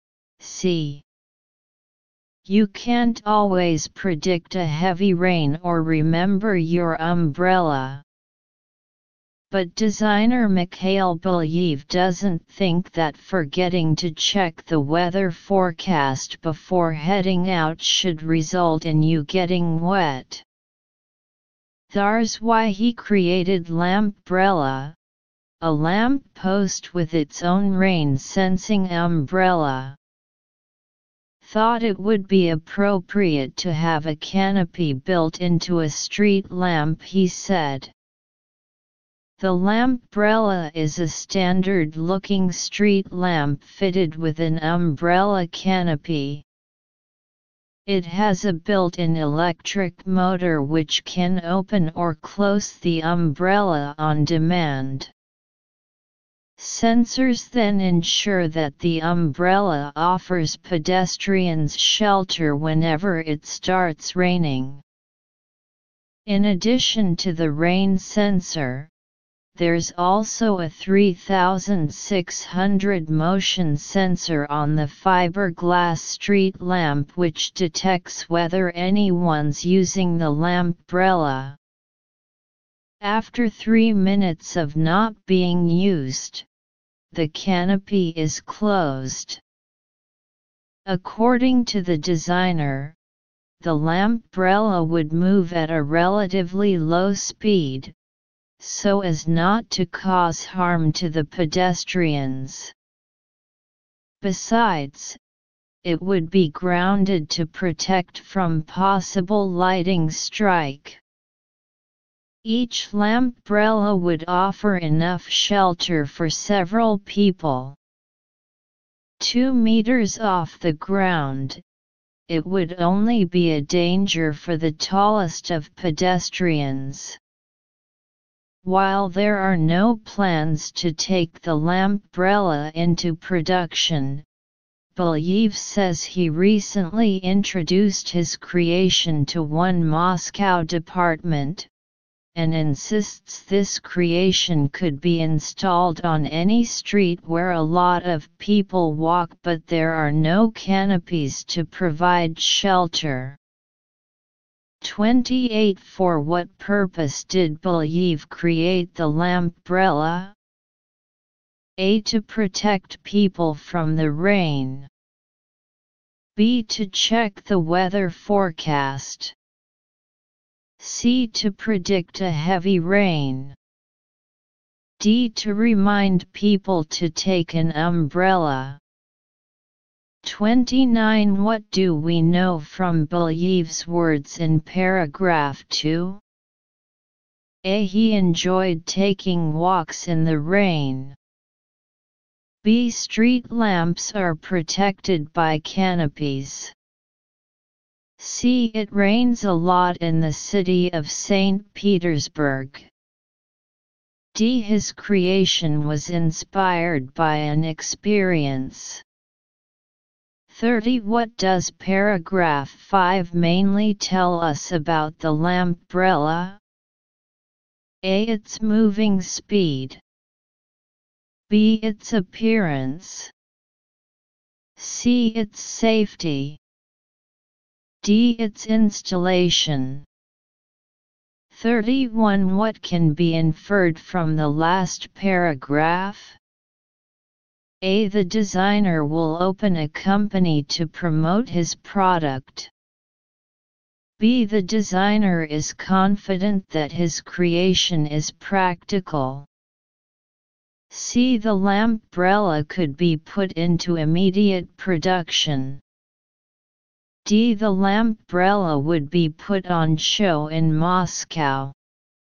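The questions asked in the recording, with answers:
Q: For what purpose did Belyev create the Lampbrella?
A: A: To protect people from the rain.

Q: What does paragraph 5 mainly tell us about the Lampbrella?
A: C: Its safety.

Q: What can be inferred from the last paragraph?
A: B: The designer is confident that his creation is practical.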